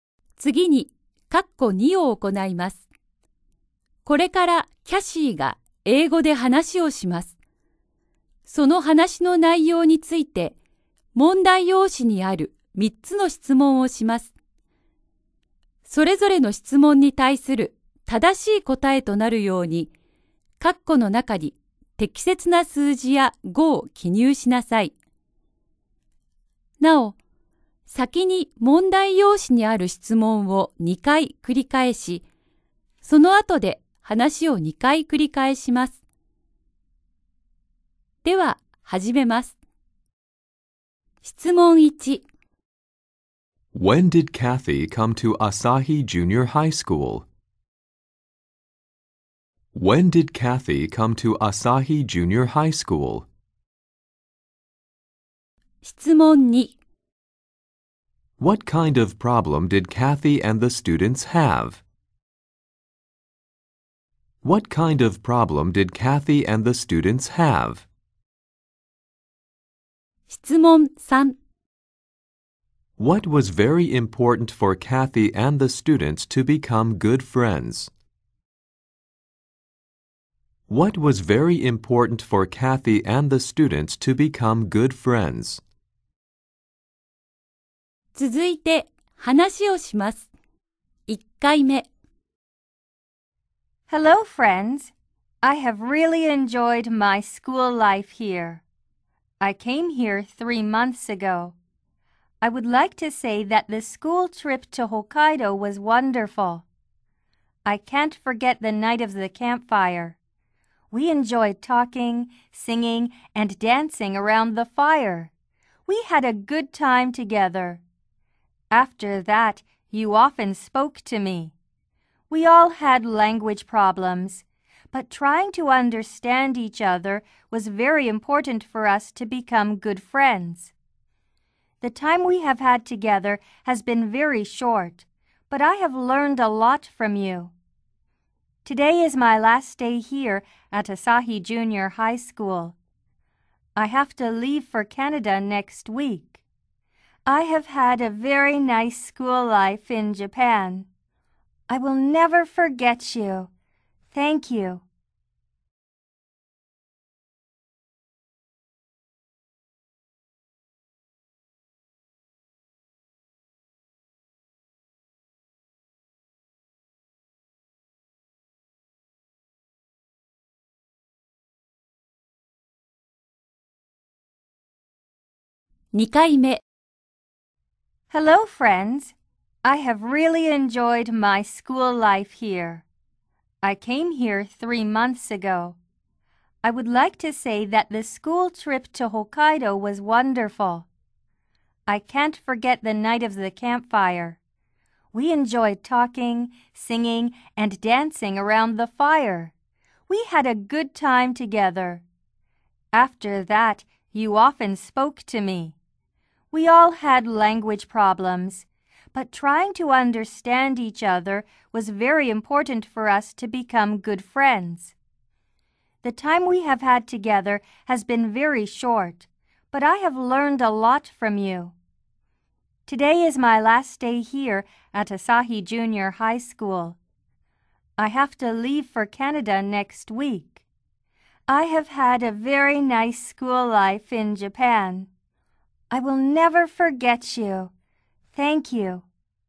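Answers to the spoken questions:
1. 3 months ago
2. Language problems
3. Trying to understand each other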